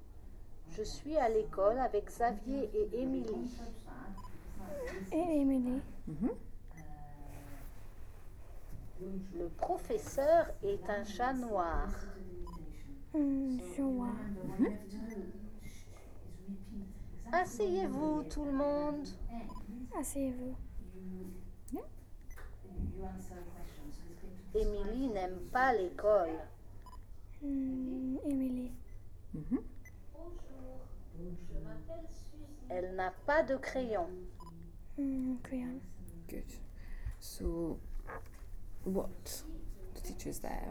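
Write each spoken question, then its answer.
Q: what does he tell them to do?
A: Sit down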